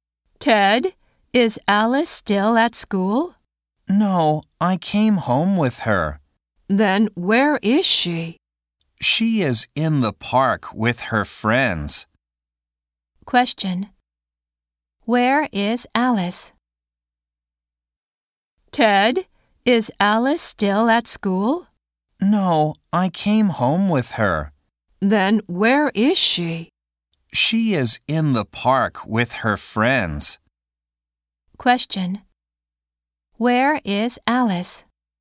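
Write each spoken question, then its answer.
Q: Question. Where is Alice?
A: In the park with her friends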